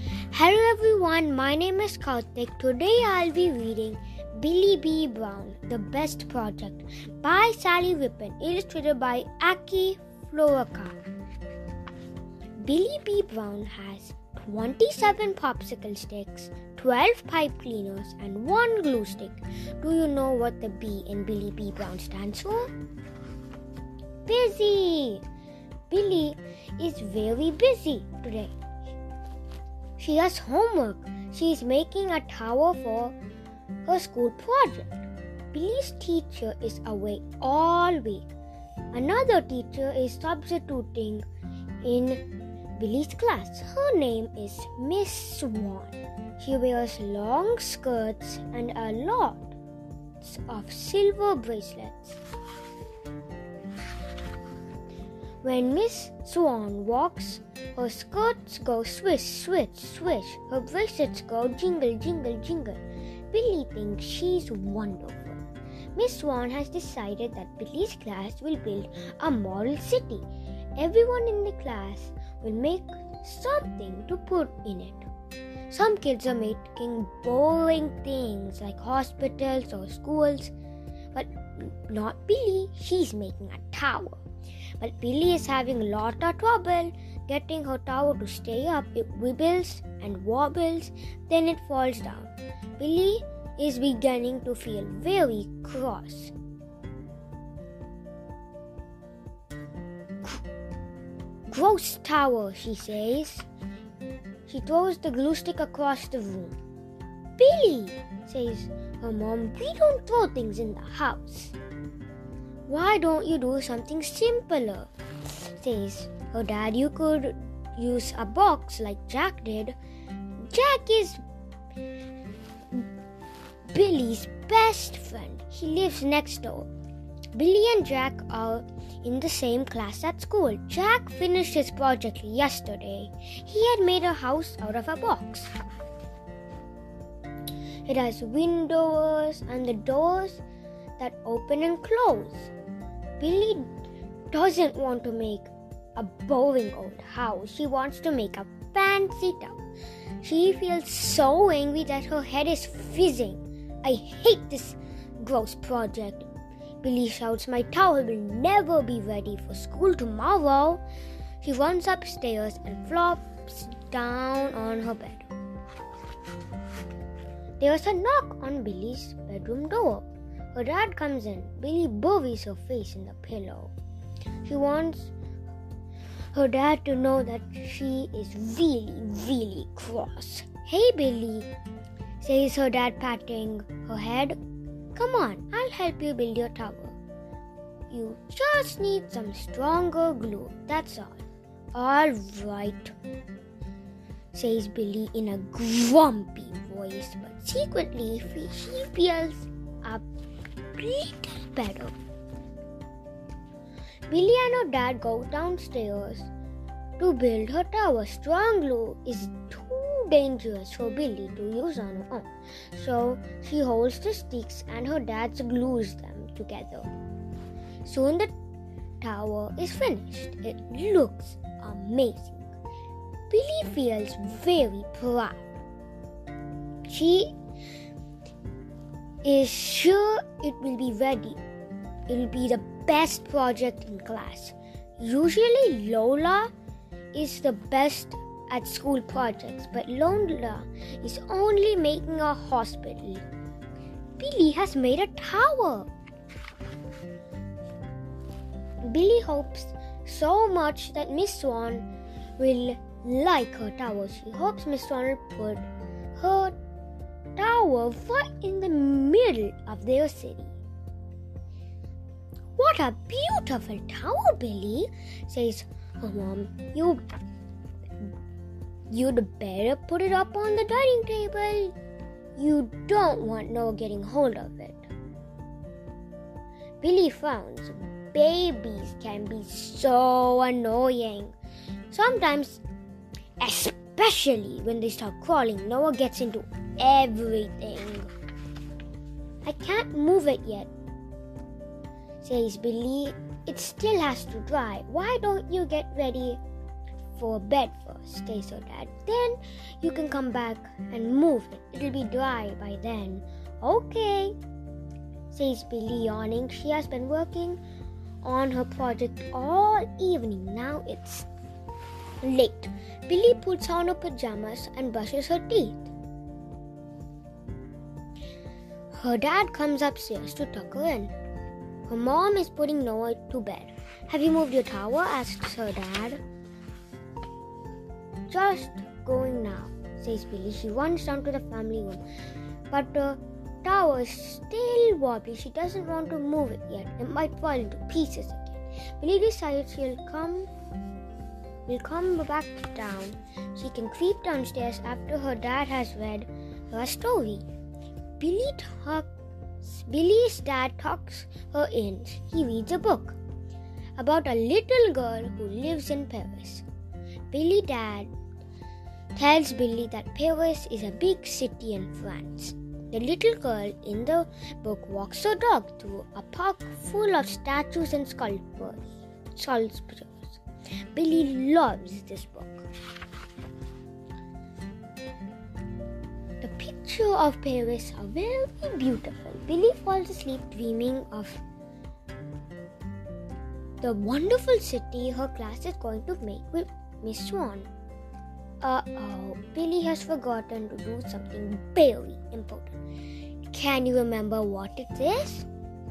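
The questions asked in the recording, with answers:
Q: Can you remember what it is?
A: To move her tower up onto the dining table so Noah can't get it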